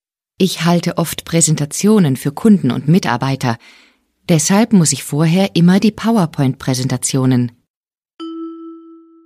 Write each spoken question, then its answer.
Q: Deshalb muss ich vorher immer die PowerPoint-Präsentationen.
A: Vorbereiten.